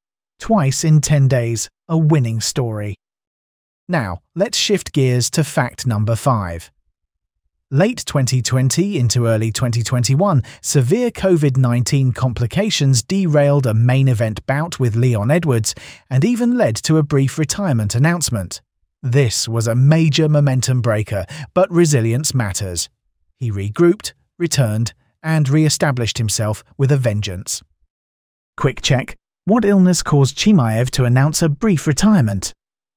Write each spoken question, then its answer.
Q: What illness caused Chimaev to announce a brief retirement?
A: Correct answer, COVID-19.